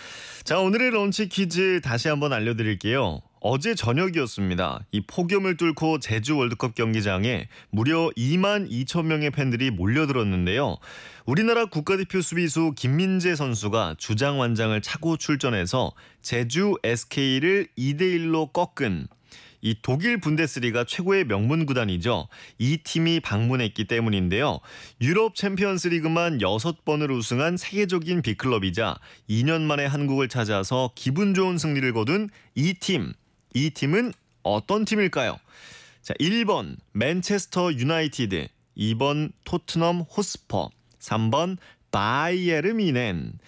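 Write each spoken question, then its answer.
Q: 이 팀은 어떤 팀일까요? 자, 1번 맨체스터 유나이티드, 2번 토트넘 호스퍼, 3번 바이에르 미넨.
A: 3: 바이에른 뮌헨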